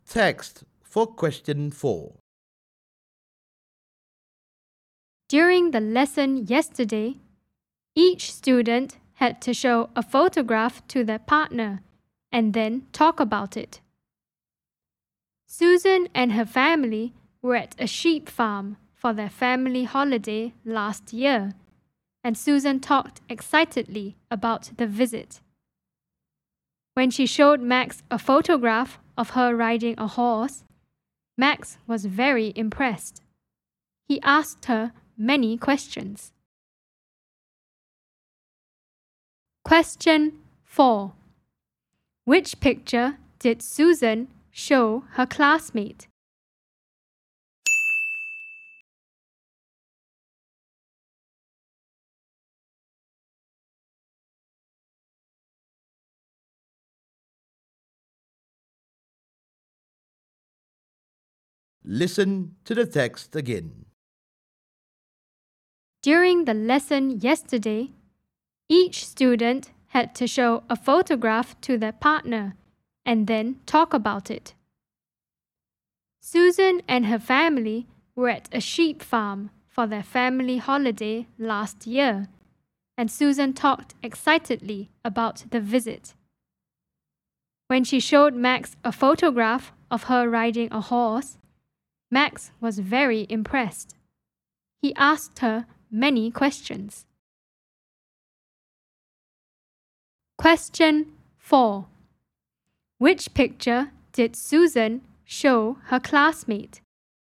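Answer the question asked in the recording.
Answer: A photograph of her riding a horse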